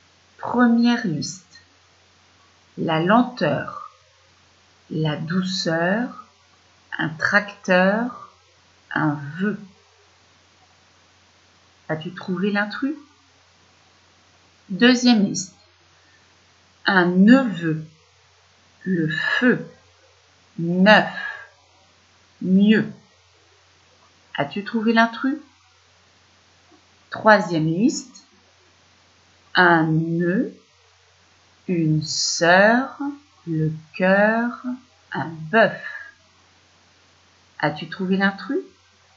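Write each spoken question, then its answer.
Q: Première liste, la lenteur, la douceur, un tracteur, un vœu. As-tu trouvé l'intrus?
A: un vœu

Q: Un neveu, le feu, neuf, mieux. As-tu trouvé l'intrus?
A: neuf

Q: Un nœud, une sœur, le cœur, un bœuf. As-tu trouvé l'intrus ?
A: un nœud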